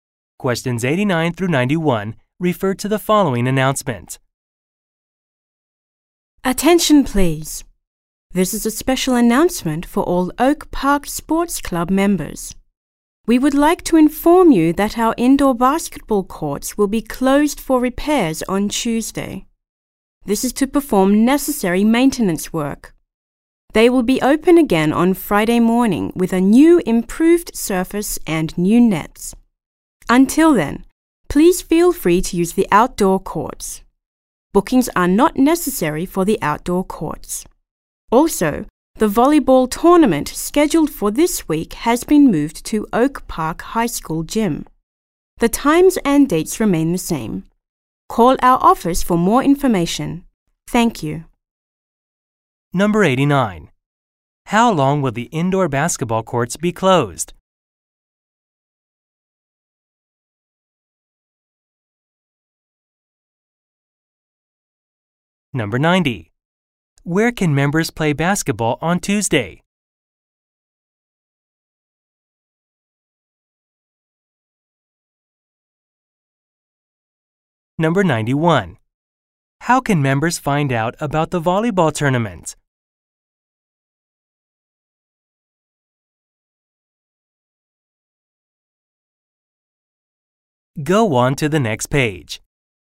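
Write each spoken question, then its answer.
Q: Where can members play basketball on Tuesday?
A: On the outdoor courts

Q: How can members find out about the volleyball tournament?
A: By calling the office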